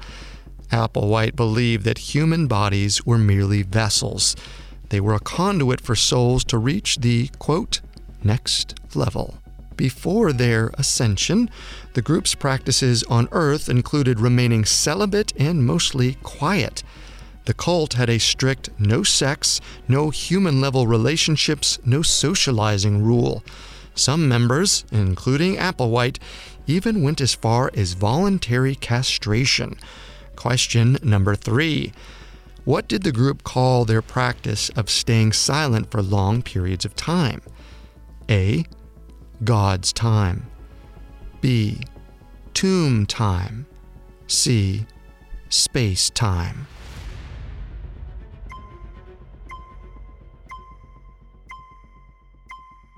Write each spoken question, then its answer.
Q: What did the group call their practice of staying silent for long periods of time?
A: The correct answer is B. Tomb time.